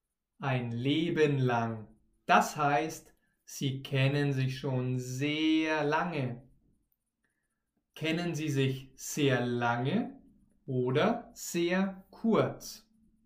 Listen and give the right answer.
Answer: Sehr lange. Sie kennen sich sehr lange.